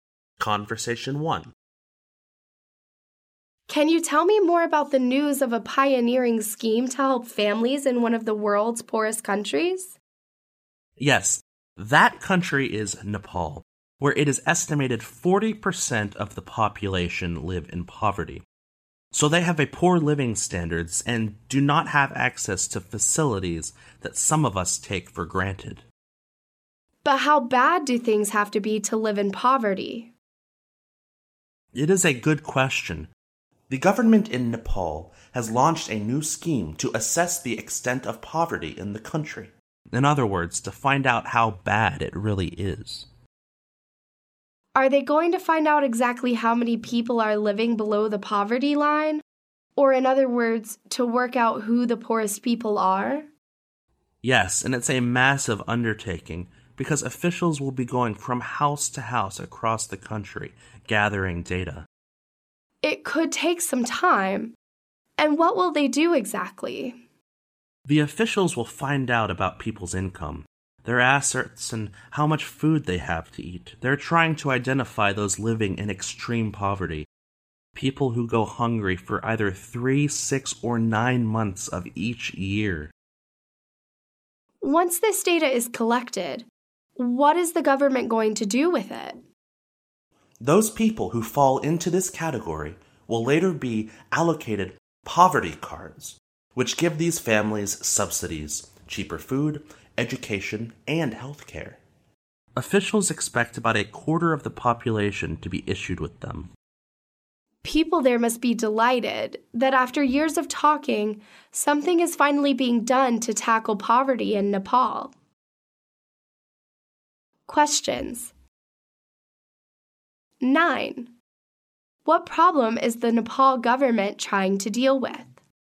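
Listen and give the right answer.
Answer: Poverty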